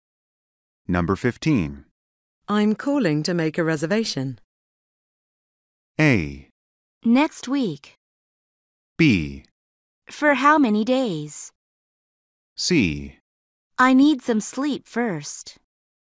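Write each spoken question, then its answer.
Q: I'm calling to make a reservation.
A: B: For how many days?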